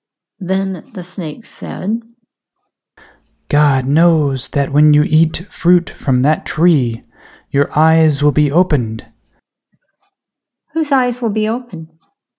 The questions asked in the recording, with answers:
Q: Whose eyes will be opened?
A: The woman's eyes will be opened.